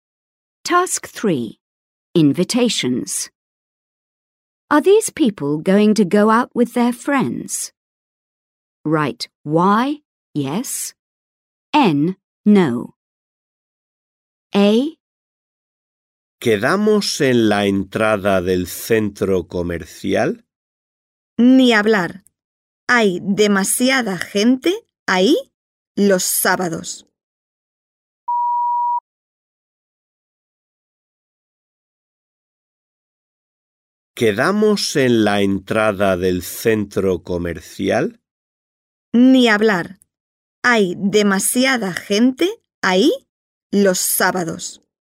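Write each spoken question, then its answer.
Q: Are these people going to go out with their friends?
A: N (no)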